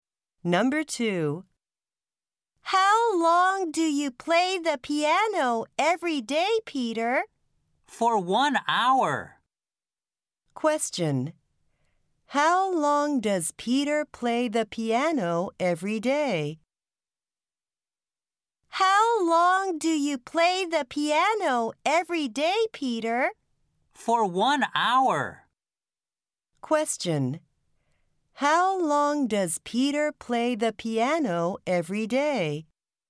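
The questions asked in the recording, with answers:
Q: How long does Peter play the piano every day?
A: For 1 hour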